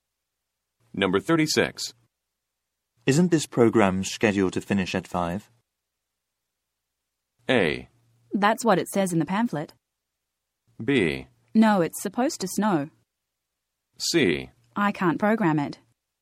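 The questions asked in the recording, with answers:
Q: Isn't this program scheduled to finish at 5?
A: A: That's what it says in the pamphlet.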